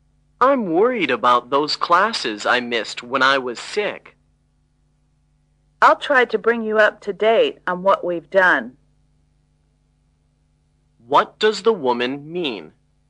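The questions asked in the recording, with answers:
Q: What does the woman mean?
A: She will help him catch up on the classes he missed.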